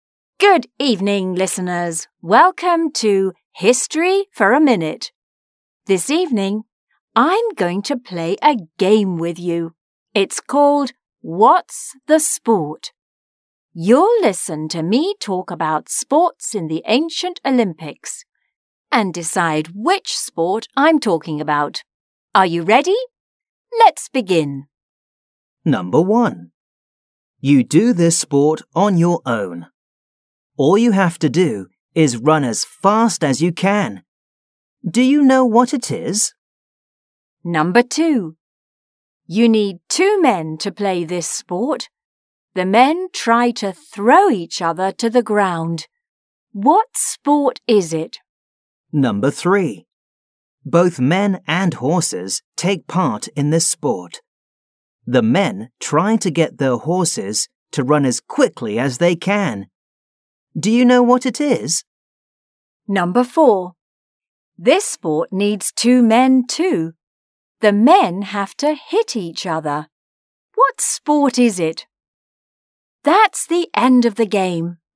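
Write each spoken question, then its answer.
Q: Do you know what it is?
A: running

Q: What sport is it?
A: wrestling

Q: Do you know what it is?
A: horse racing

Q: What sport is it?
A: boxing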